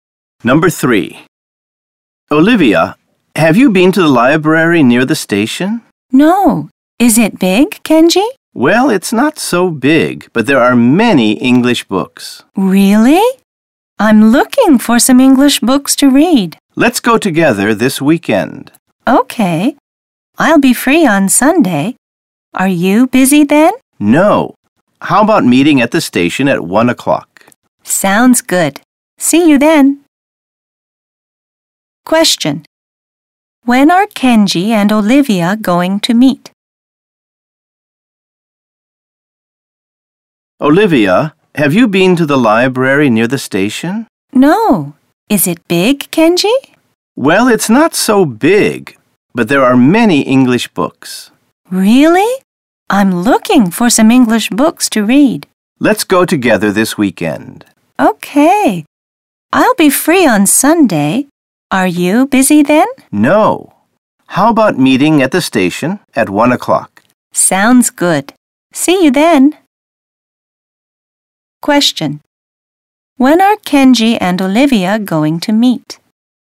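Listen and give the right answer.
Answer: On Sunday at 1 o'clock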